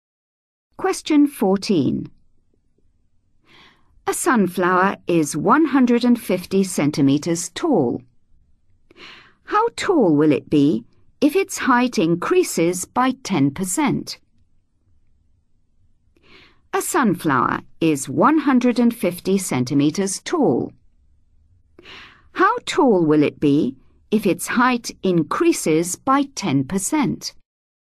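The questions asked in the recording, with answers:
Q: How tall will it be if its height increases by 10%?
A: 165 cm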